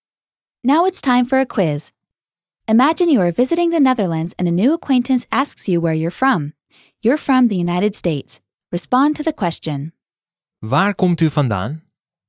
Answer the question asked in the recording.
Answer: Ik kom uit de Verenigde Staten.